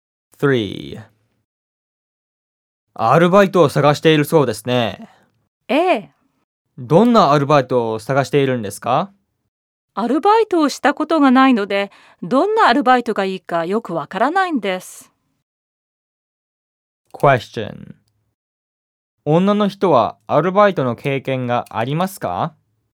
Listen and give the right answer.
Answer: 女の人はアルバイトの経験がないらしいです。